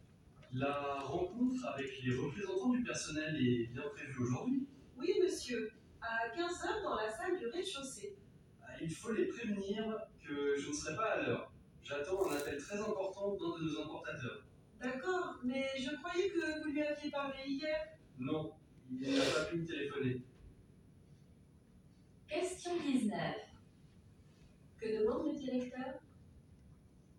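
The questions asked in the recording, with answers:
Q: Que demande le directeur?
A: De prévenir les représentants du personnel qu'il ne sera pas à l'heure à la réunion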